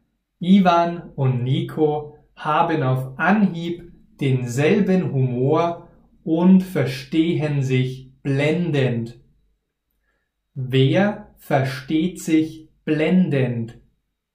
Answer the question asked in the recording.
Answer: Ivan und Nico, sie verstehen sich blendend.